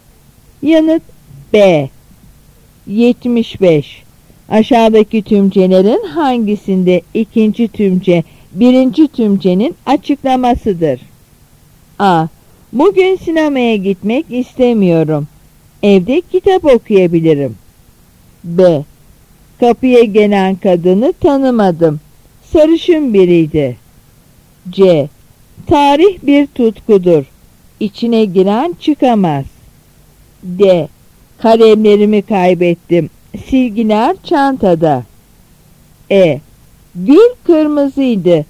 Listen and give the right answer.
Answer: Yanıt C.